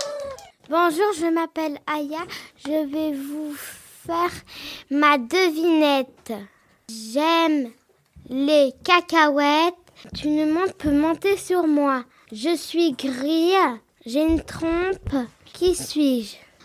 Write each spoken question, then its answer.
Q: Je suis gris, j'ai une trompe, qui suis-je ?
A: Un éléphant.